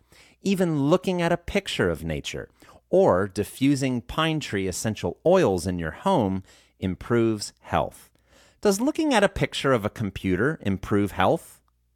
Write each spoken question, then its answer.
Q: Does looking at a picture of a computer improve health?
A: No, looking at a picture of a computer does not improve health.